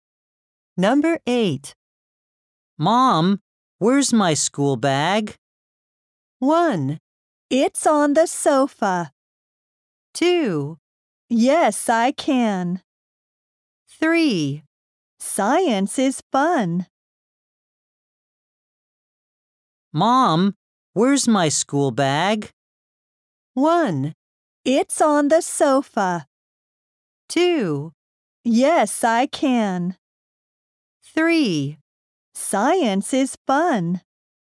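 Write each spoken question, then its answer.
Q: Mom, where's my school bag?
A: 1: It's on the sofa.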